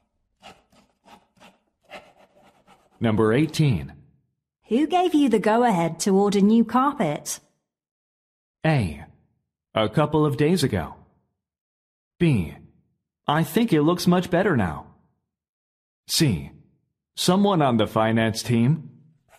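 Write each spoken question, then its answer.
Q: Who gave you the go-ahead to order new carpet?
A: C: Someone on the finance team.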